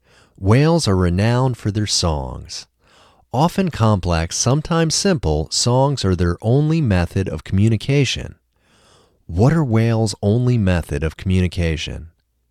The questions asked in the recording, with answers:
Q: What are whales' only method of communication?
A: Songs are whales' only method of communication.